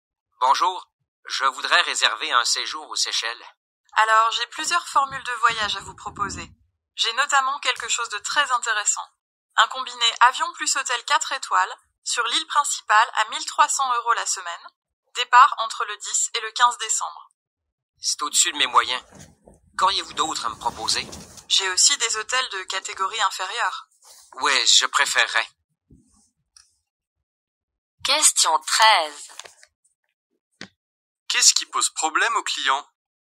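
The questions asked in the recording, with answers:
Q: Qu'est-ce qui pose problème aux clients?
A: Le prix : c'est trop cher (au-dessus de ses moyens).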